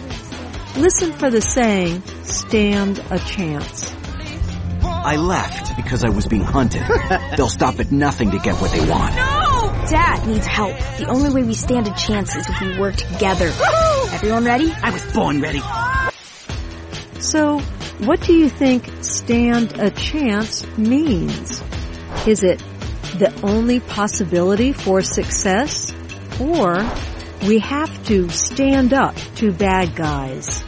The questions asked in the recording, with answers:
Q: So what do you think stand a chance means?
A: Stand a chance means the only possibility for success.